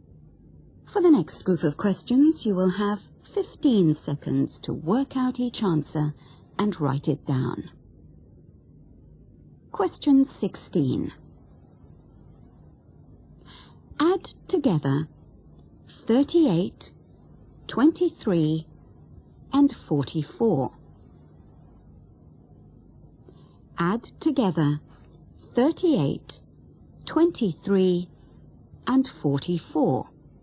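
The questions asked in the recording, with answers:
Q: Add together 38, 23, and 44.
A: 105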